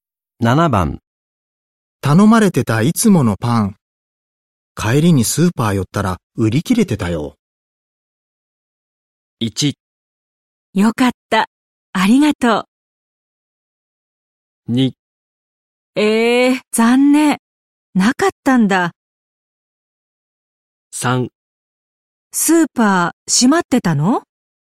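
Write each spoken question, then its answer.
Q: 頼まれてたいつものパン、帰りにスーパー寄ったら売り切れてたよ。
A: 2: 残念、なかったんだ。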